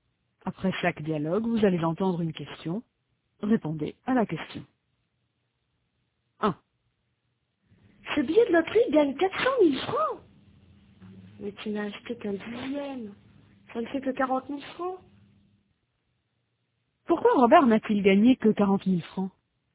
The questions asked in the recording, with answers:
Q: Pourquoi Robert n'a-t-il gagné que 40 000 francs?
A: Parce qu'il n'a acheté qu'un dixième.